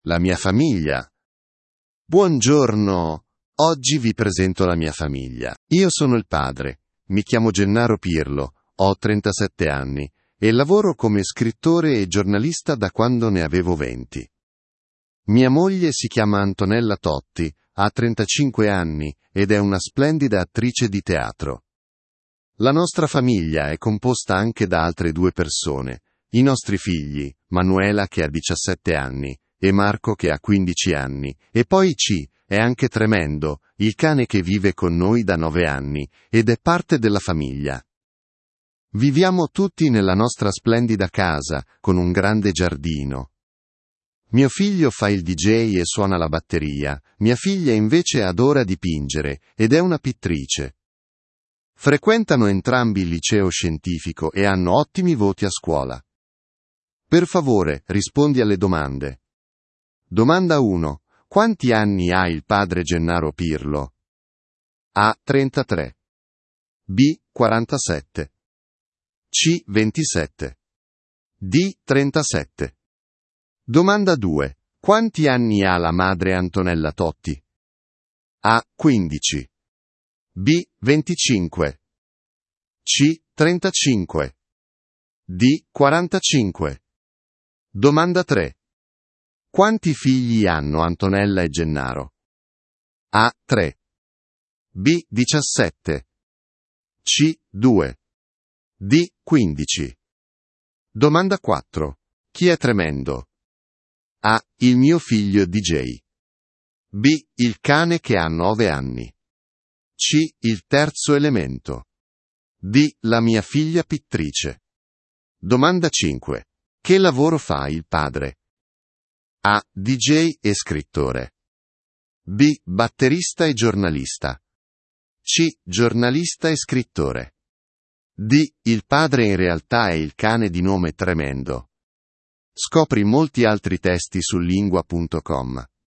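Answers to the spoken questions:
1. D: 37
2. C: 35
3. C: 2
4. B: Il cane che ha 9 anni.
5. C: Giornalista e scrittore.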